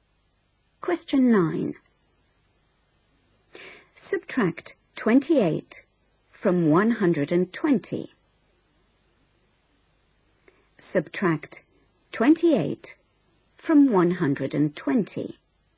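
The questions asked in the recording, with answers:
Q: Subtract 28 from 120.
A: 92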